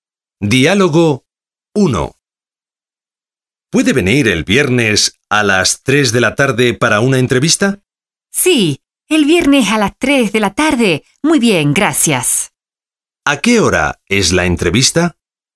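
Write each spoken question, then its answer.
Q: ¿A qué hora es la entrevista?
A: A las 3 de la tarde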